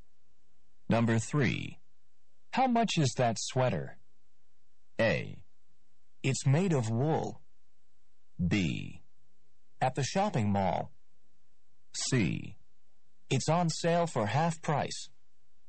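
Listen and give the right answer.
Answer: C: It's on sale for half price.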